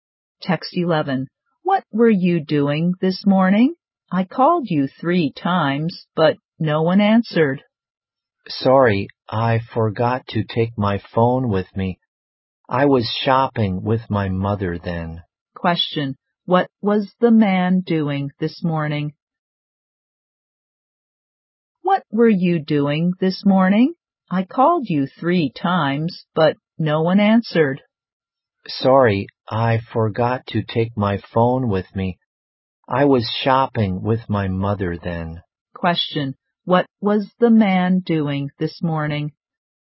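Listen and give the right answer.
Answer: Shopping with his mother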